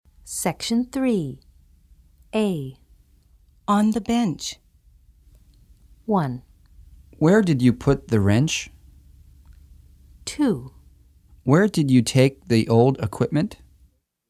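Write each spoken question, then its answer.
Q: On the bench.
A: 1: Where did you put the wrench?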